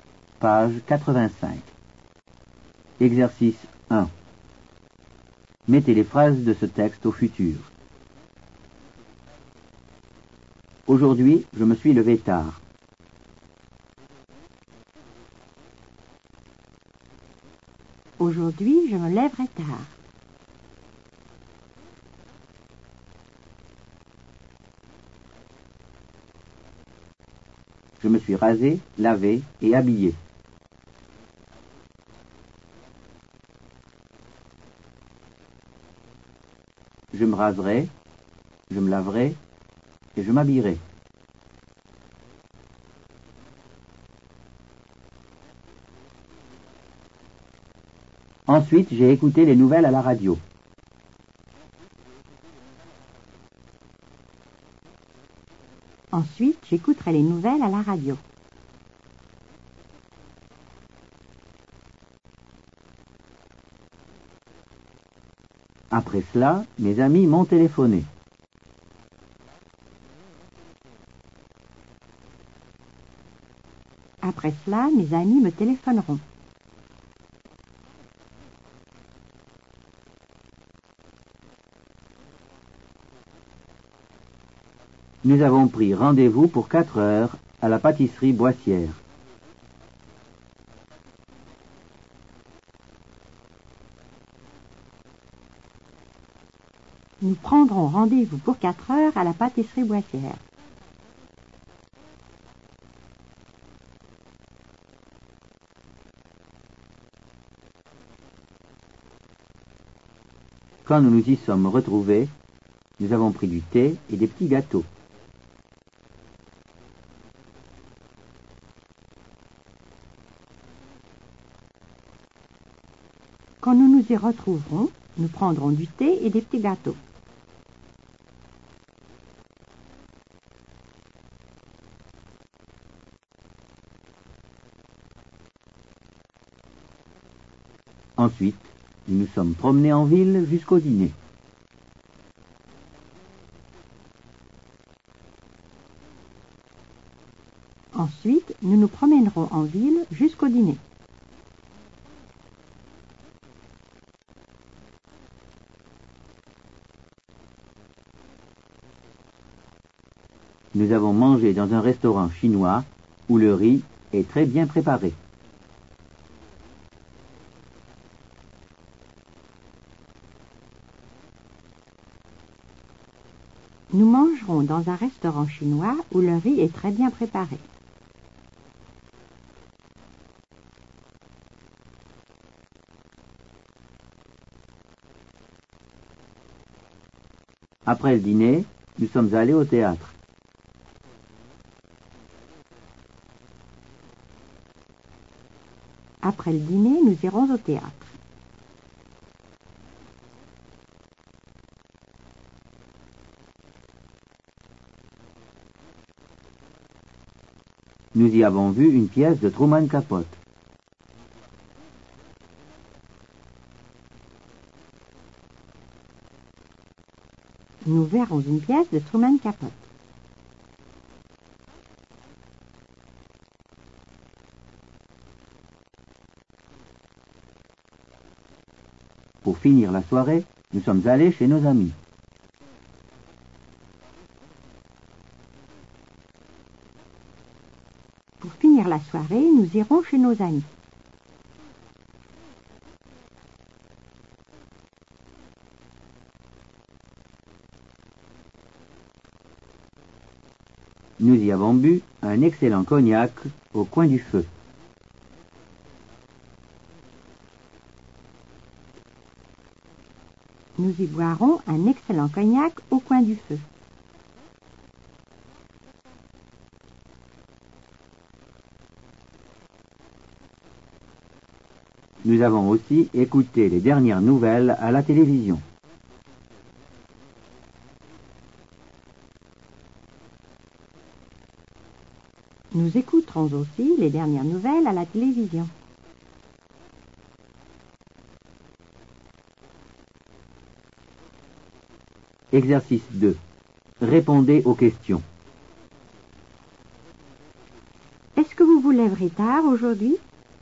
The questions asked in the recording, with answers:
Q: Est-ce que vous vous lèverez tard aujourd'hui?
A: Oui, aujourd'hui, je me lèverai tard.